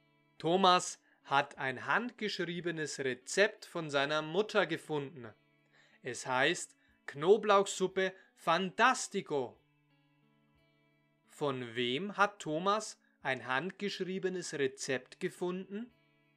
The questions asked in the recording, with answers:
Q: Von wem hat Thomas ein handgeschriebenes Rezept gefunden?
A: von seiner Mutter.